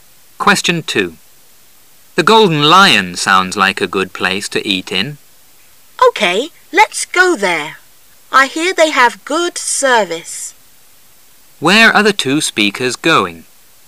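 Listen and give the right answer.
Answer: To the Golden Lion, a restaurant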